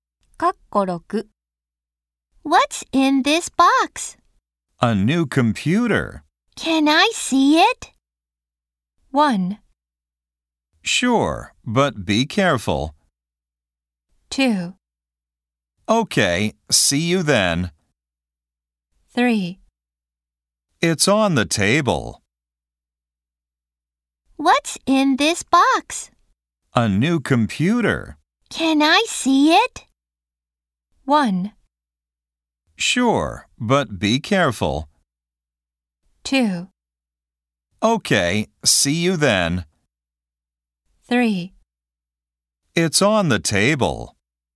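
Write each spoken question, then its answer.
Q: Can I see it?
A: 1: Sure, but be careful.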